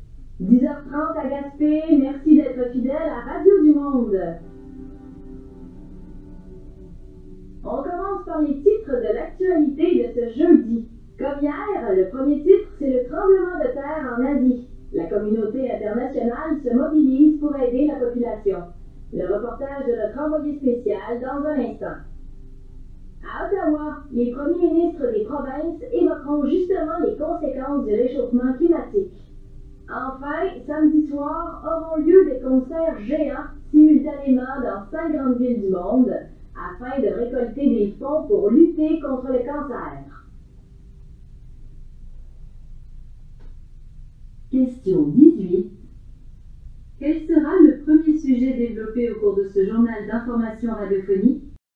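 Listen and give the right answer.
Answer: Le tremblement de terre en Asie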